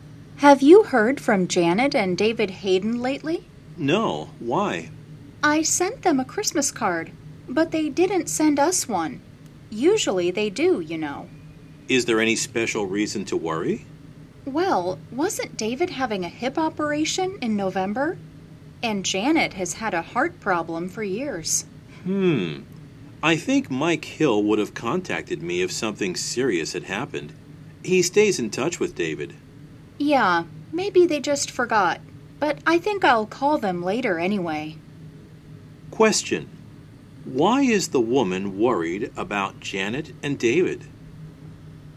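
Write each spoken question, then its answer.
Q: Why is the woman worried about Janet and David?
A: They didn't send a Christmas card, and they have health problems (David's hip operation, Janet's heart problem).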